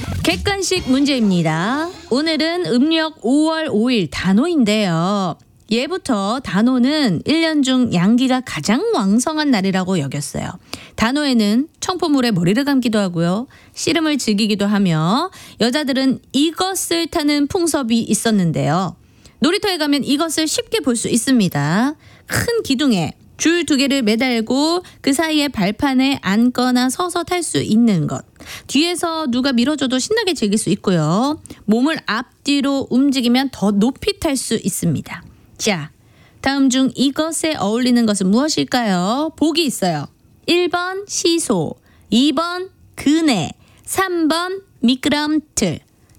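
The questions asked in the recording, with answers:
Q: 자, 다음 중 이것에 어울리는 것은 무엇일까요?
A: 2: 그네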